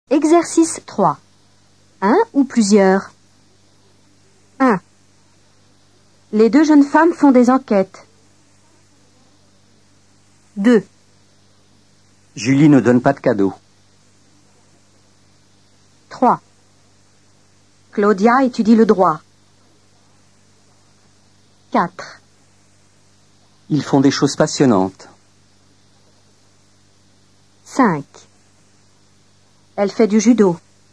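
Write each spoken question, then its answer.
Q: Un ou plusieurs?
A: plusieurs

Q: Un ou plusieurs?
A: un

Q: Un ou plusieurs?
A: un

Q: Un ou plusieurs?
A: plusieurs

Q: Un ou plusieurs?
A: un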